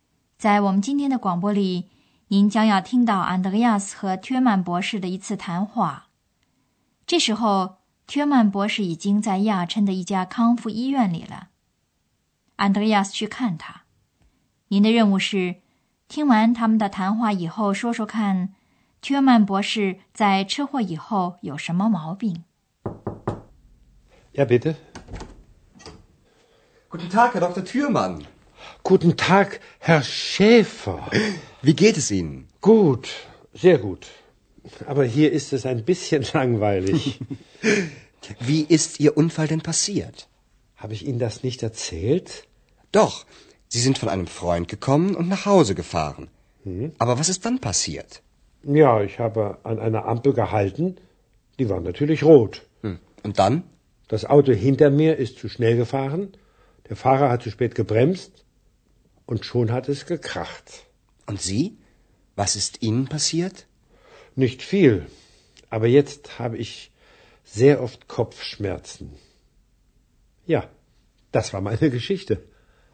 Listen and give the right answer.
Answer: 原来 Thürmann 博士在车祸以后常常头疼。